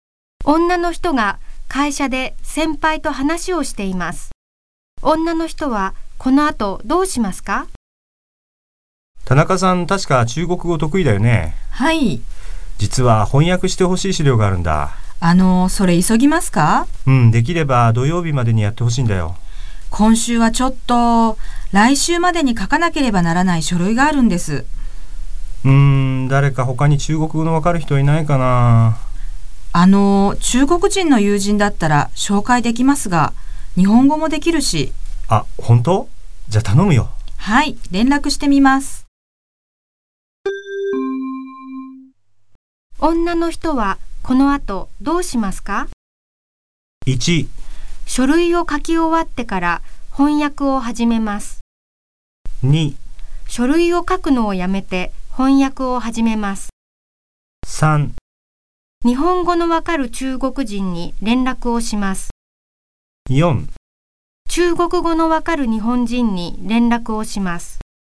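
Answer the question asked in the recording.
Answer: 3: 日本語のわかる中国人に連絡をします。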